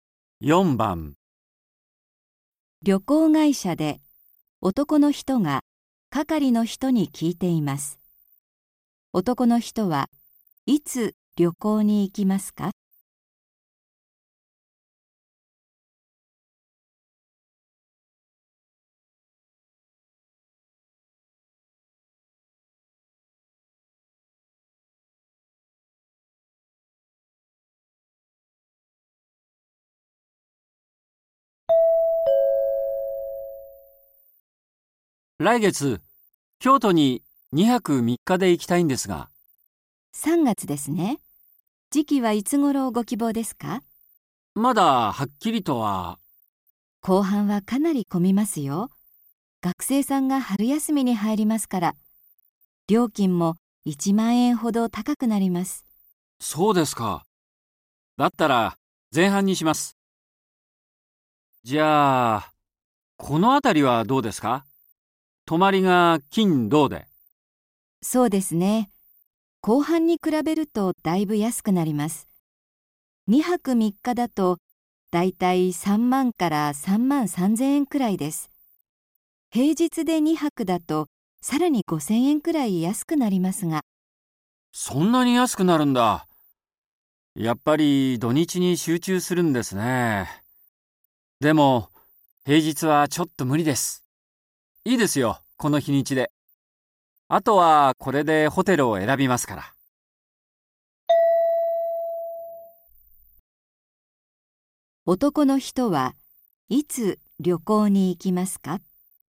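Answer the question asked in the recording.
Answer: 3月の前半、金曜日と土曜日に泊まる(週末の2泊3日)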